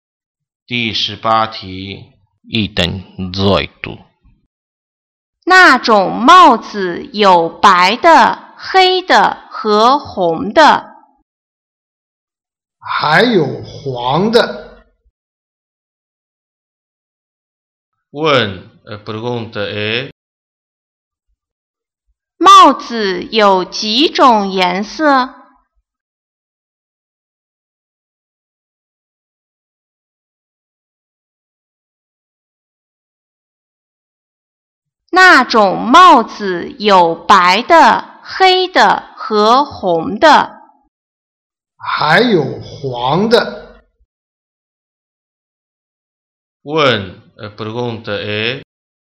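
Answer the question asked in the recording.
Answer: 四种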